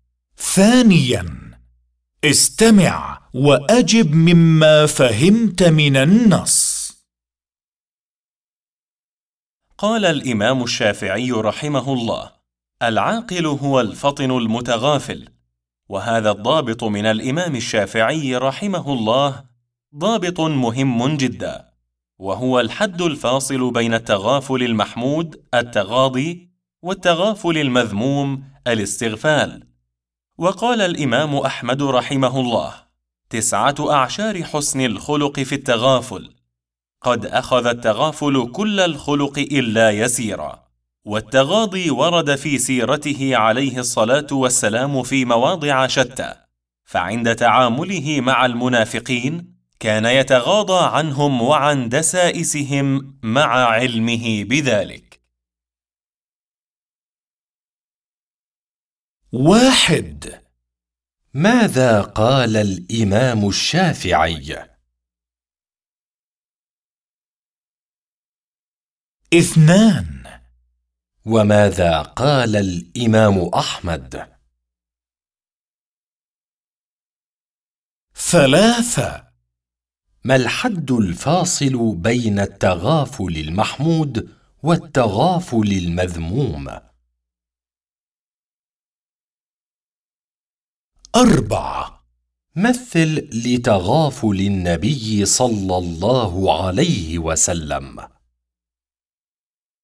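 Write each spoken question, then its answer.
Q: ماذا قال الإمام الشافعي؟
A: العاقل هو الفطن المتغافل

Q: وماذا قال الإمام أحمد؟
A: تسعة أعشار حسن الخلق في التغافل

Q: مثل لتغافل النبي صلى الله عليه وسلم.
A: تغاضيه عن المنافقين ودسائسهم مع علمه بذلك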